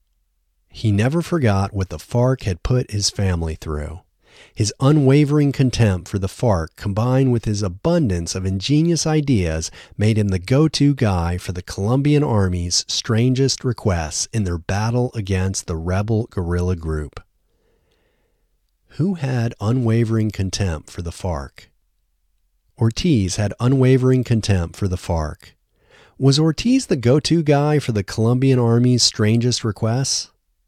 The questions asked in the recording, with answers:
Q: Was Ortiz the go-to guy for the Colombian Army's strangest requests?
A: Yes, Ortiz was the go-to guy for the Colombian Army's strangest requests.